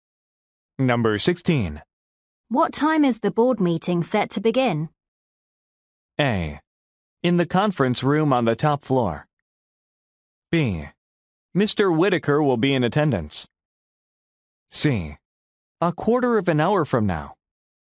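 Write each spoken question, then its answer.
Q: What time is the board meeting set to begin?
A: C: A quarter of an hour from now.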